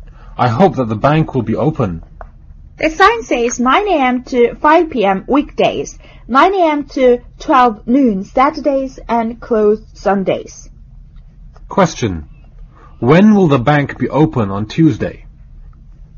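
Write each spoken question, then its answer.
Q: When will the bank be open on Tuesday?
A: 9 a.m. to 5 p.m.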